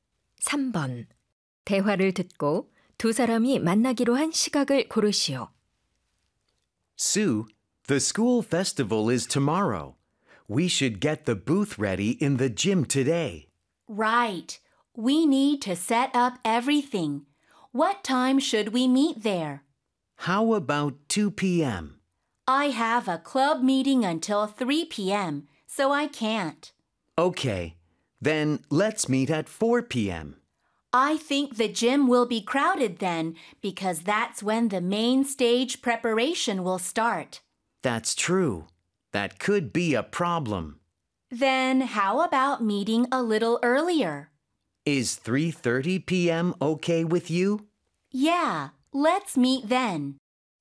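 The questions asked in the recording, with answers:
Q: 대화를 듣고 두 사람이 만나기로 한 시각을 고르시오.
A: 오후 3시 30분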